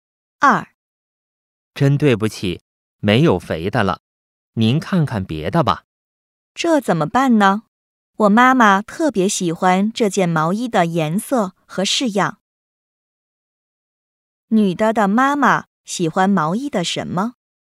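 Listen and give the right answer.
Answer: 颜色和式样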